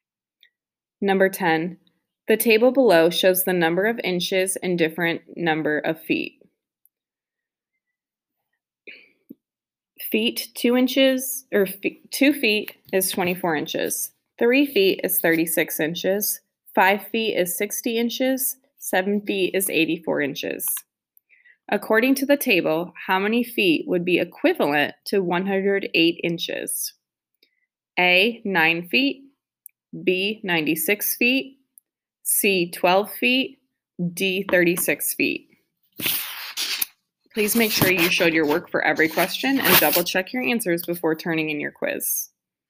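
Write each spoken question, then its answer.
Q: According to the table, how many feet would be equivalent to 108 inches?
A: A: 9 feet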